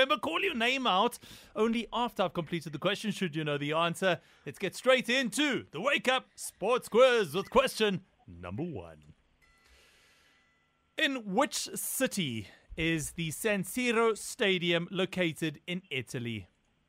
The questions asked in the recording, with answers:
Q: In which city is the San Siro Stadium located in Italy?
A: I was looking for Milan.